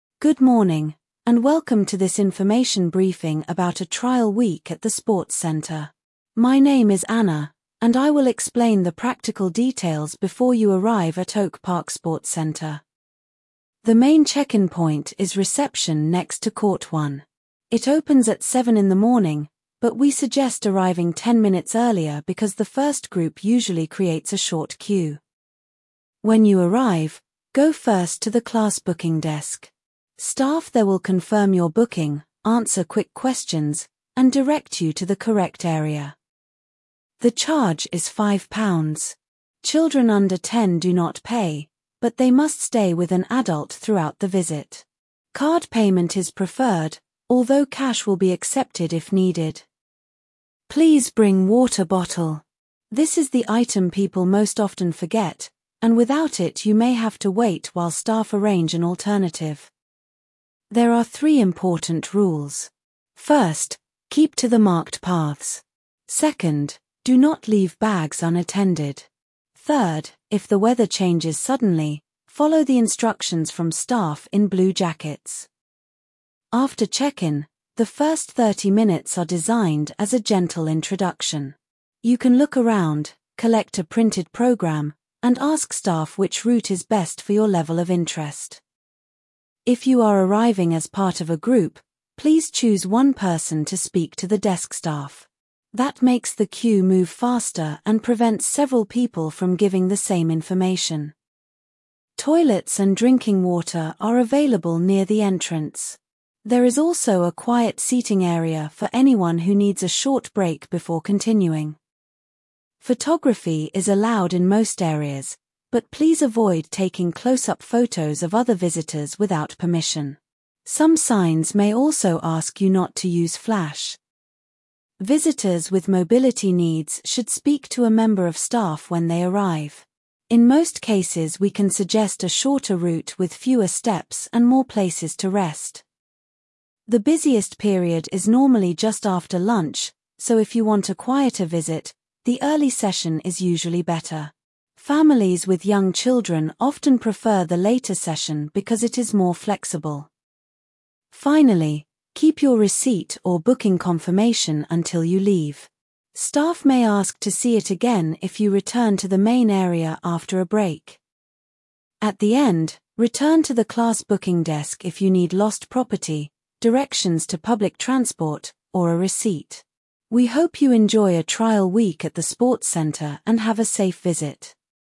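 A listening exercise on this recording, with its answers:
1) What is the talk mainly about?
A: A trial week at the sports centre

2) Where is the main check-in point?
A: Reception next to court one

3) What time does check-in open?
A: Seven in the morning

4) Where should visitors go first?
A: Class booking desk

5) How much is the charge?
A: Five pounds

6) What should visitors bring?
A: Water bottle

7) Who gives instructions if the weather changes?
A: Staff in blue jackets

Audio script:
Good morning, and welcome to this information briefing about a trial week at the sports centre. My name is Anna, and I will explain the practical details before you arrive at Oak Park Sports Centre.
The main check-in point is reception next to court one. It opens at seven in the morning, but we suggest arriving ten minutes earlier because the first group usually creates a short queue.
When you arrive, go first to the class booking desk. 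Staff there will confirm your booking, answer quick questions, and direct you to the correct area.
The charge is five pounds. Children under ten do not pay, but they must stay with an adult throughout the visit. Card payment is preferred, although cash will be accepted if needed.
Please bring water bottle. This is the item people most often forget, and without it you may have to wait while staff arrange an alternative.
There are three important rules. First, keep to the marked paths. Second, do not leave bags unattended. Third, if the weather changes suddenly, follow the instructions from staff in blue jackets.
After check-in, the first thirty minutes are designed as a gentle introduction. You can look around, collect a printed programme, and ask staff which route is best for your level of interest.
If you are arriving as part of a group, please choose one person to speak to the desk staff. 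That makes the queue move faster and prevents several people from giving the same information.
Toilets and drinking water are available near the entrance. There is also a quiet seating area for anyone who needs a short break before continuing.
Photography is allowed in most areas, but please avoid taking close-up photos of other visitors without permission. Some signs may also ask you not to use flash.
Visitors with mobility needs should speak to a member of staff when they arrive. In most cases we can suggest a shorter route with fewer steps and more places to rest.
The busiest period is normally just after lunch, so if you want a quieter visit, the early session is usually better. Families with young children often prefer the later session because it is more flexible.
Finally, keep your receipt or booking confirmation until you leave. Staff may ask to see it again if you return to the main area after a break.
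At the end, return to the class booking desk if you need lost property, directions to public transport, or a receipt.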